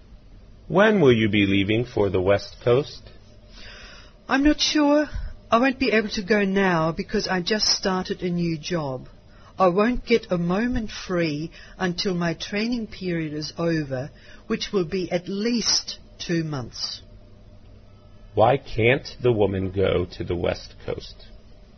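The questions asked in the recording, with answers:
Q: Why can't the woman go to the West Coast?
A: She just started a new job and is in training.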